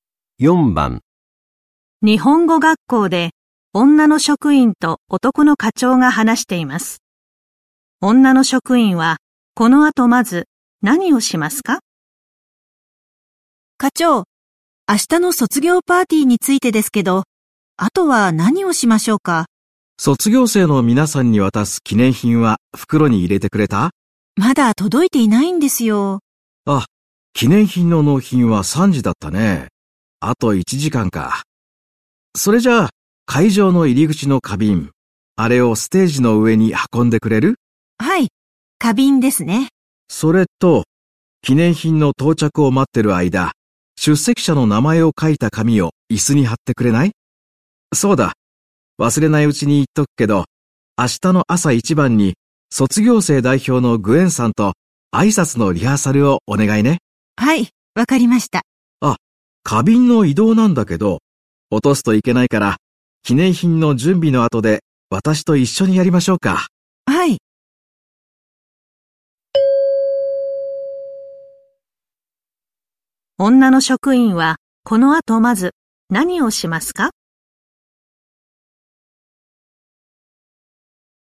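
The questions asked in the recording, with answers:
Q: 女の職員はこの後まず何をしますか?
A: 出席者の名前を書いた紙を椅子に貼る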